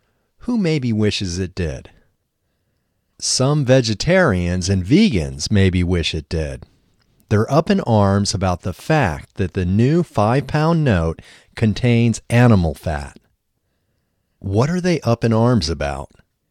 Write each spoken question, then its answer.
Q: What are they up in arms about?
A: They are up in arms about the fact that the new 5-pound note contains animal fat.